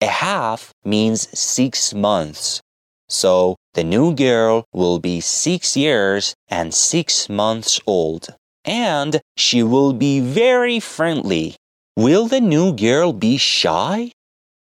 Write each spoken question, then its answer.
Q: Will the new girl be shy?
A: No. She will be very nice and friendly.